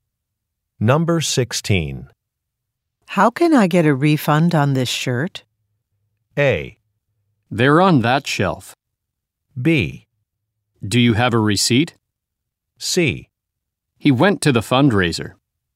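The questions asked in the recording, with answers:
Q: How can I get a refund on this shirt?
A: B: Do you have a receipt?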